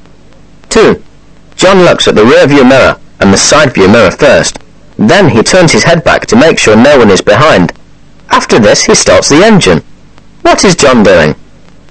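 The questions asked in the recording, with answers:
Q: What is John doing?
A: Starting to drive a car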